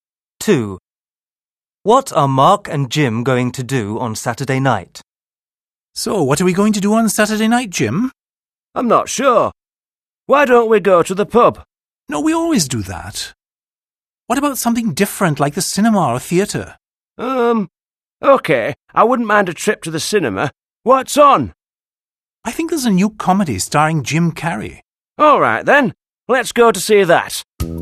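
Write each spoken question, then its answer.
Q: What are Mark and Jim going to do on Saturday night?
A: Go to the cinema to see a comedy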